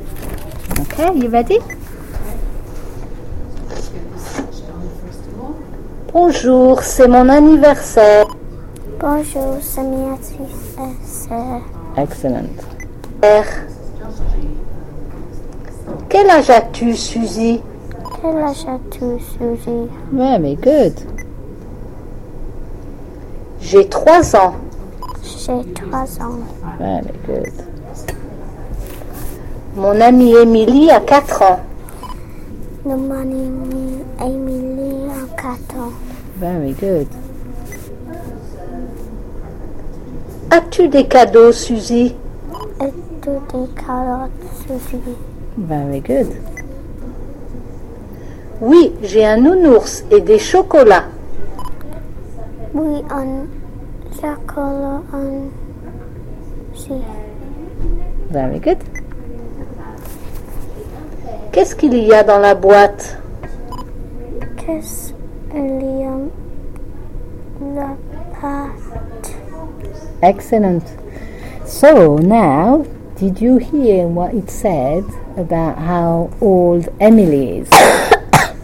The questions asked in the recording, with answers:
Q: did you hear what it said about how old Emily is?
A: Mon amie Emily a 4 ans.